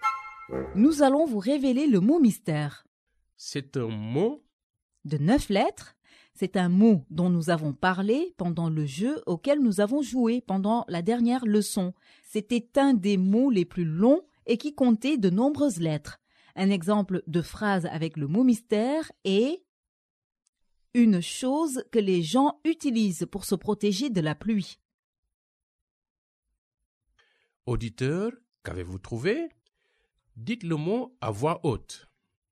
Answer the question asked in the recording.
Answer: Le mot mystère d'aujourd'hui est parapluie.